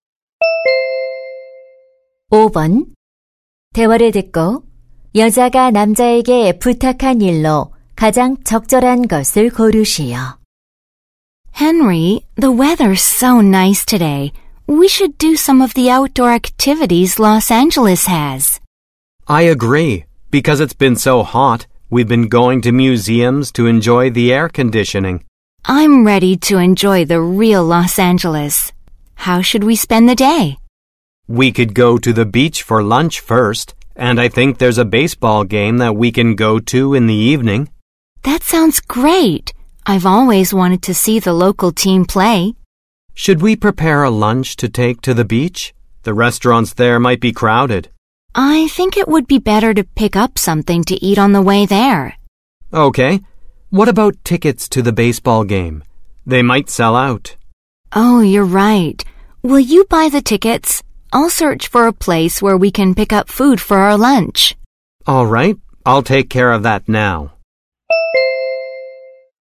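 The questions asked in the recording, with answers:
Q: 대화를 듣고 여자가 남자에게 부탁한 일로 가장 적절한 것을 고르시오.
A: 야구 경기 티켓 구매하기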